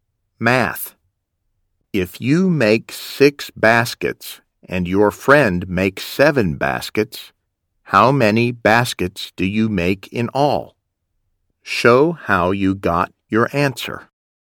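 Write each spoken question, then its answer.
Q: If you make 6 baskets and your friend makes 7 baskets, how many baskets do you make in all?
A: 13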